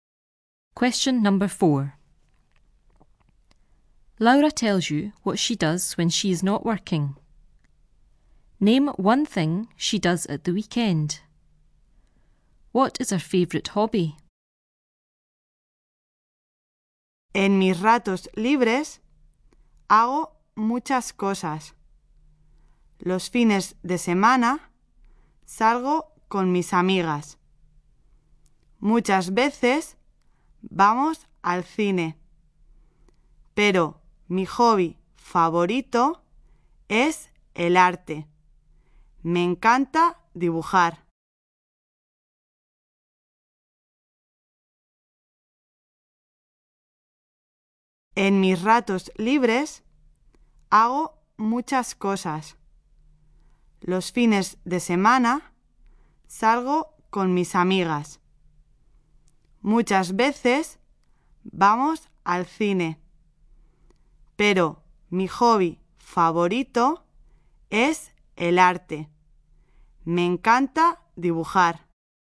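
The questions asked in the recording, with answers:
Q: Name one thing she does at the weekend.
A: Goes out with her friends / goes to the cinema

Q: What is her favorite hobby?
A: Art (drawing)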